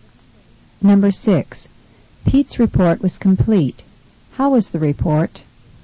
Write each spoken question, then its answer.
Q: How was the report?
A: Number 6 is B, thorough.